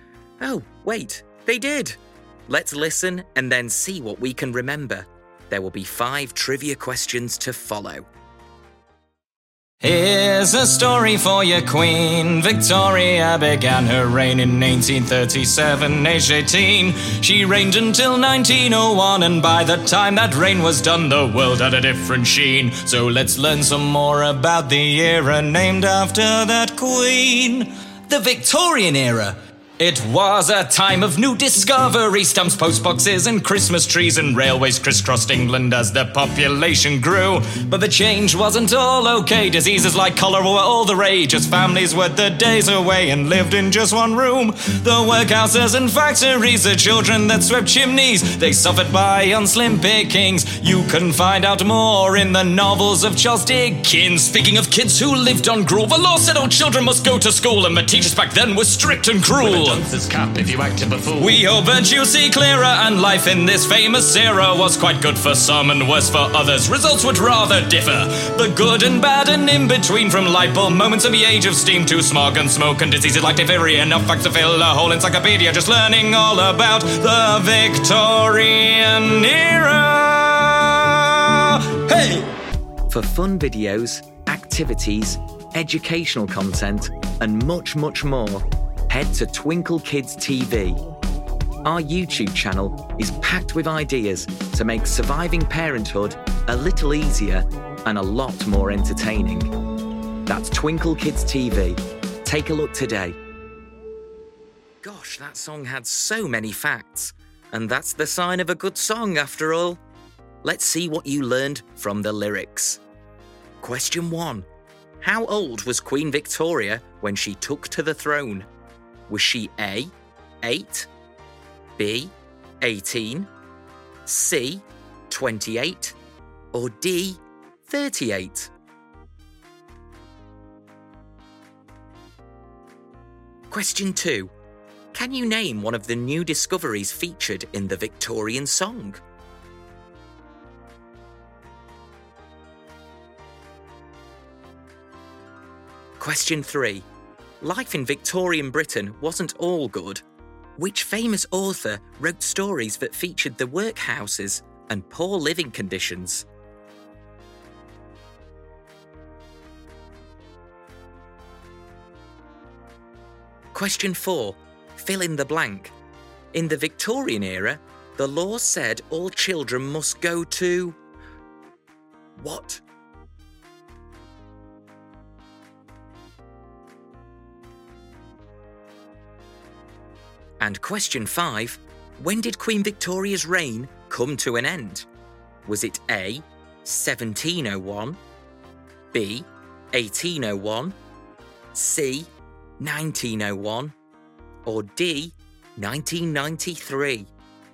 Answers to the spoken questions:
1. The answer is B, 18.
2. There was the invention of stamps and postboxes to send your letters.
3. That would be Charles Dickens.
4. In the Victorian era, the law said all children must go to school.
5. The answer is C, 1901.